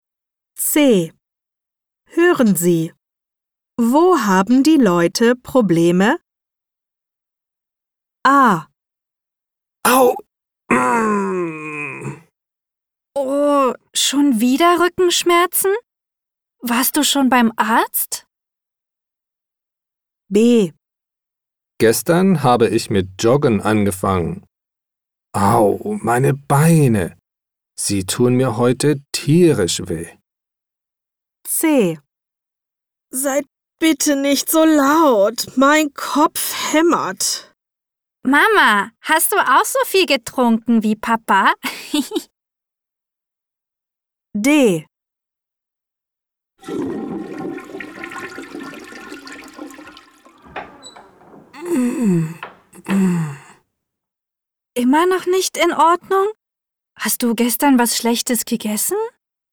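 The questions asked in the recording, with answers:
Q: Wo haben die Leute Probleme?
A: Rücken (Rückenschmerzen)

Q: Wo haben die Leute Probleme?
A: Beine

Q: Wo haben die Leute Probleme?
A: Kopf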